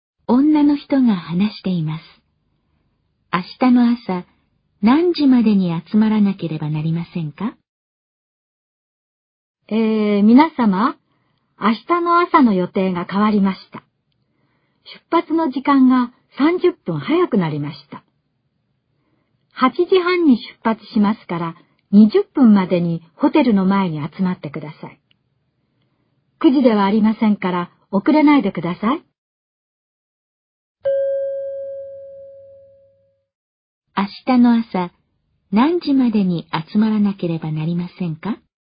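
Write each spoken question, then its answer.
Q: 明日の朝、何時までに集まらなければなりませんか?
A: 8時20分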